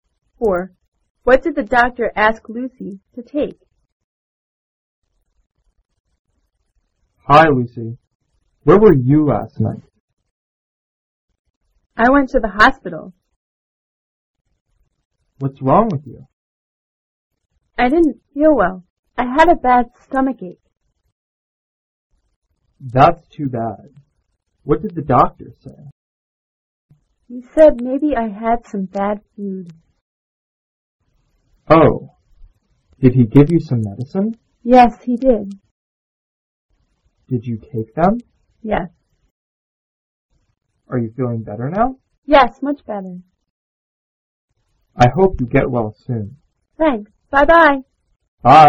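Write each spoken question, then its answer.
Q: What did the doctor ask Lucy to take?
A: Some medicine.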